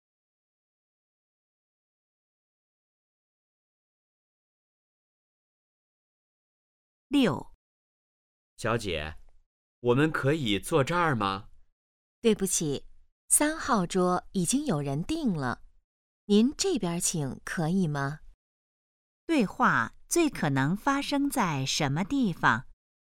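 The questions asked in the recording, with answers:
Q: 对话最可能发生在什么地方?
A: 饭店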